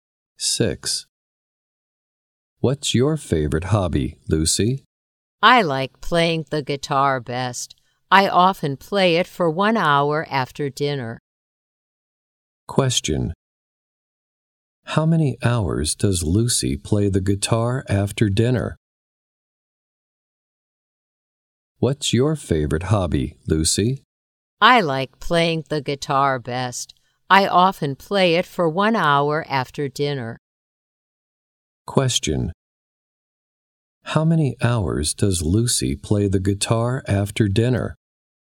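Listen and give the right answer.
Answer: One hour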